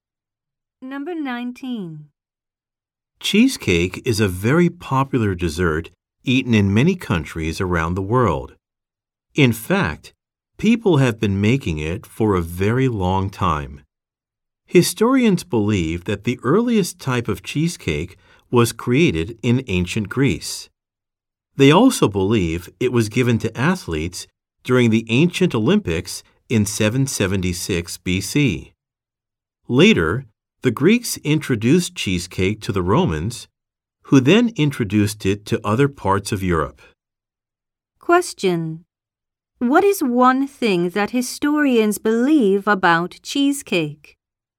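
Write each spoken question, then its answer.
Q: What is one thing that historians believe about cheesecake?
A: It was first made in ancient Greece and given to Olympic athletes.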